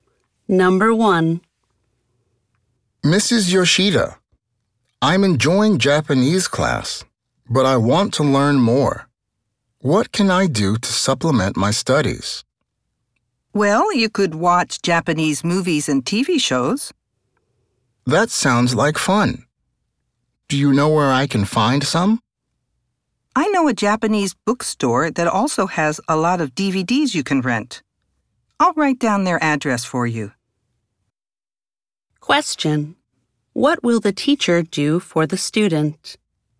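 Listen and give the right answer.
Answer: Write down the address of a Japanese bookstore that rents DVDs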